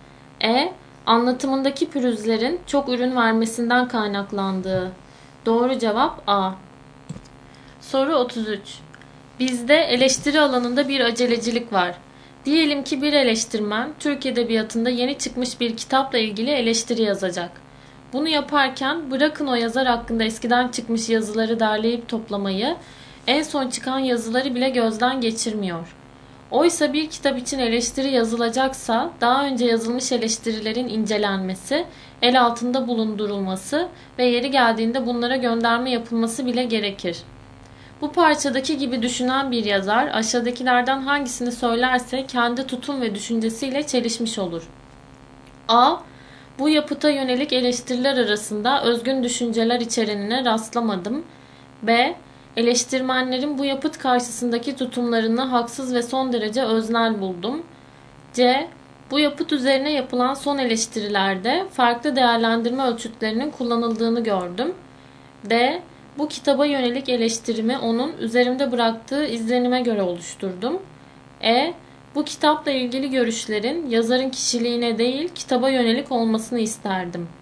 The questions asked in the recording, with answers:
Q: Bu parçadaki gibi düşünen bir yazar aşağıdakilerden hangisini söylerse kendi tutum ve düşüncesiyle çelişmiş olur.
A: Doğru cevap D.